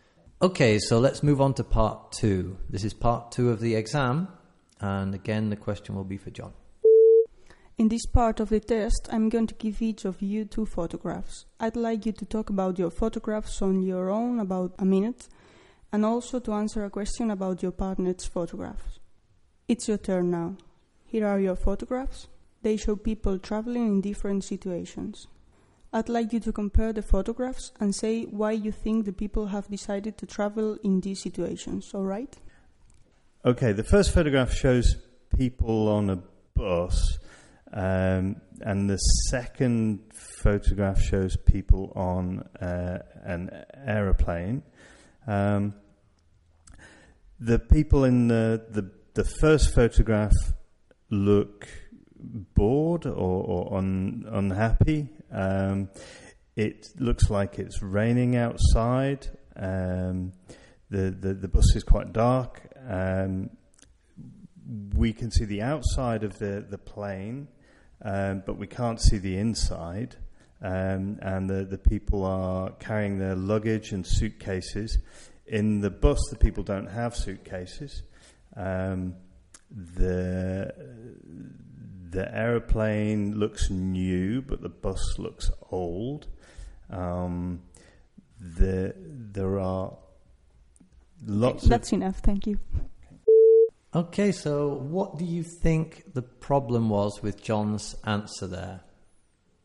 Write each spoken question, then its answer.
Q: Okay, so what do you think the problem was with John's answer there?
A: no, not at all. No.